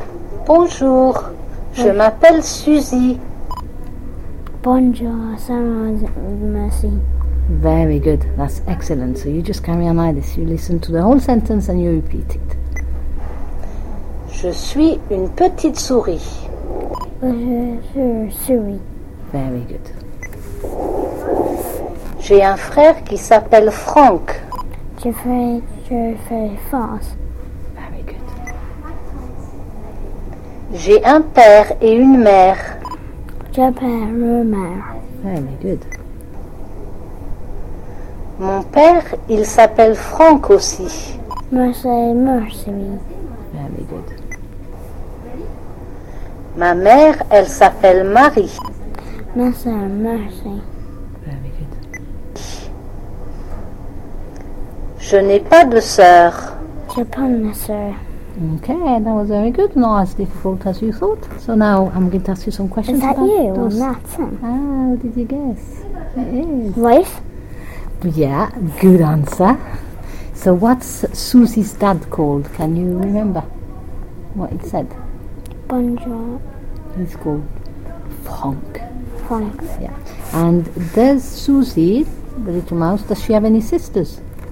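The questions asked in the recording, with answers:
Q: And does Susie, the little mouse, does she have any sisters?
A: No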